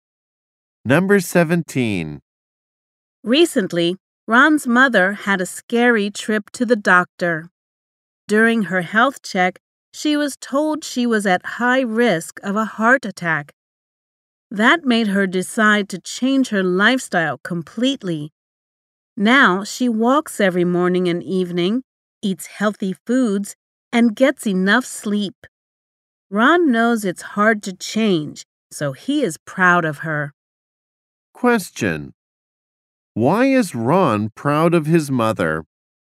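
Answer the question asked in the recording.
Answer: She changed her lifestyle to be healthier.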